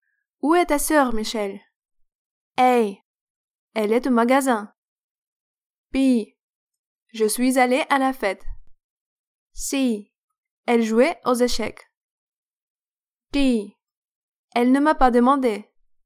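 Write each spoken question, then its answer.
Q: Où est ta sœur, Michelle?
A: A: Elle est au magasin.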